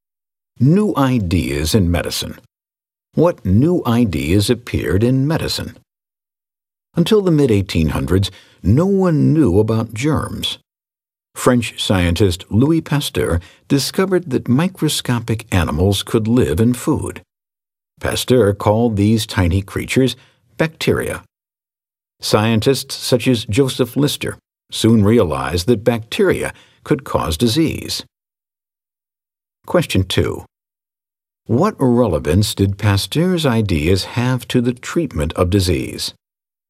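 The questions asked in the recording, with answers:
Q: What relevance did Pasteur's ideas have to the treatment of disease?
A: His discovery of bacteria led scientists to realize bacteria could cause disease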